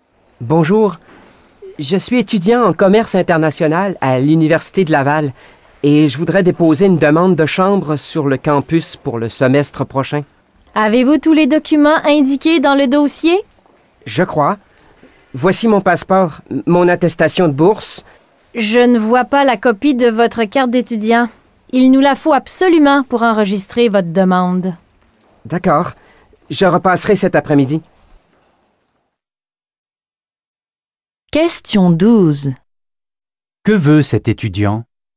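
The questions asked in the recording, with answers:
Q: Que veut cet étudiant?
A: Obtenir une chambre sur le campus pour le semestre prochain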